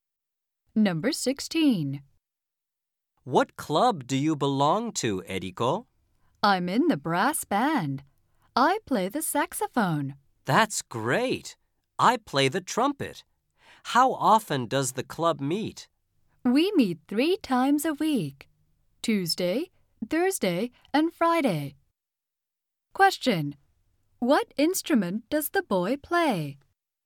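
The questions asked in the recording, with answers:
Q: What instrument does the boy play?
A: The trumpet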